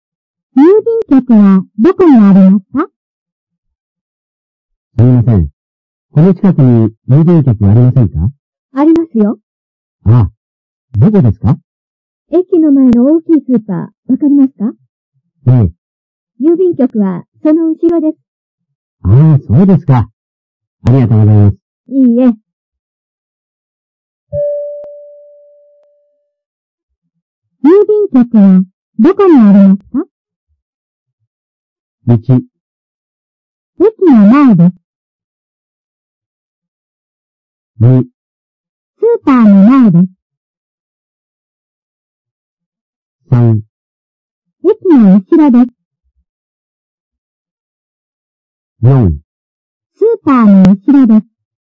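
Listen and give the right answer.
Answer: 4: スーパーの後ろです。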